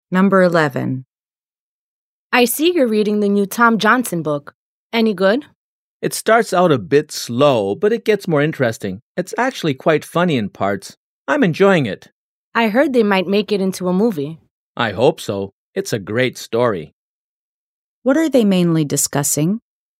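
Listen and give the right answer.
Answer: The new Tom Johnson book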